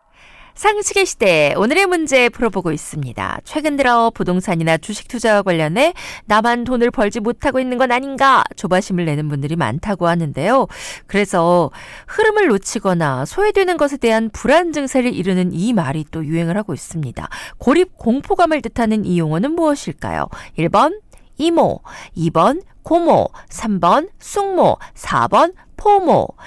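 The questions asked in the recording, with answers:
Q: 고립 공포감을 뜻하는 이 용어는 무엇일까요?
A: 4: 포모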